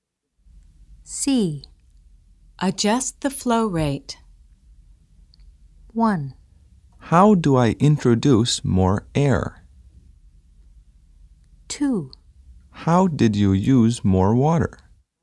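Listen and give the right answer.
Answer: 1: How do I introduce more air?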